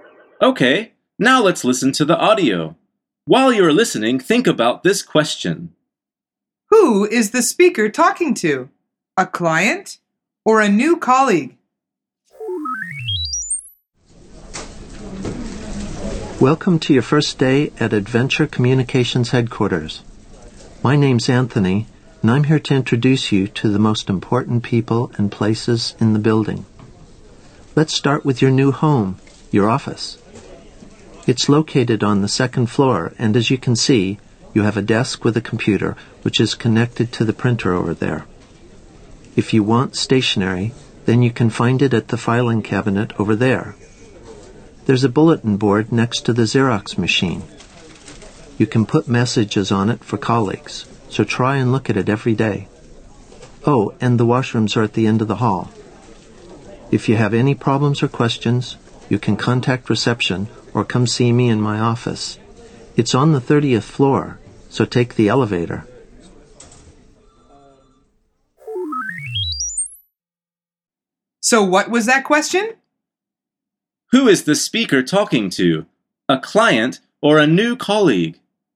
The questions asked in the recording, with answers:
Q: Who is the speaker talking to? A client or a new colleague?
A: The answer is a new colleague.